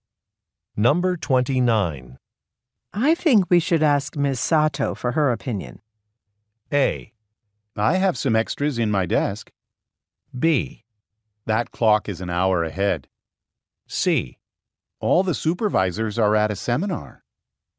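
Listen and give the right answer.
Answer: C: All the supervisors are at a seminar.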